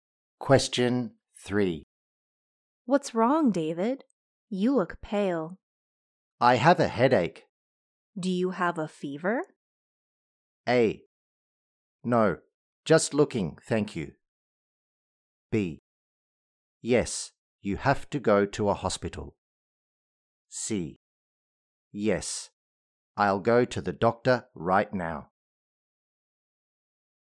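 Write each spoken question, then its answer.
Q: Do you have a fever?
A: C: Yes, I'll go to the doctor right now.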